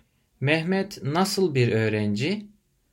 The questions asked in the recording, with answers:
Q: Mehmet nasıl bir öğrenci?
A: O çalışkan bir öğrenci.